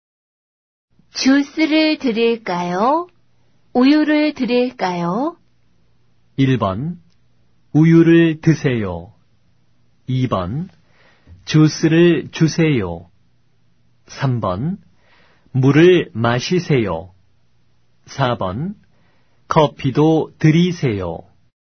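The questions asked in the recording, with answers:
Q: 주스를 드릴까요? 우유를 드릴까요?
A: 2번: 주스를 주세요.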